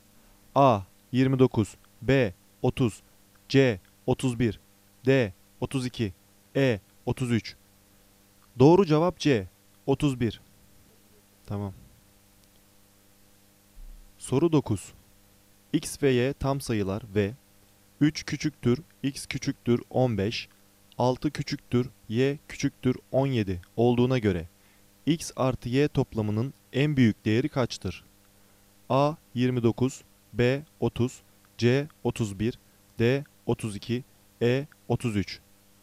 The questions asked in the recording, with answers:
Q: X ve Y tam sayılar ve 3 küçüktür, X küçüktür 15, 6 küçüktür, Y küçüktür 17 olduğuna göre X artı Y toplamının en büyük değeri kaçtır?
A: Doğru cevap B 30.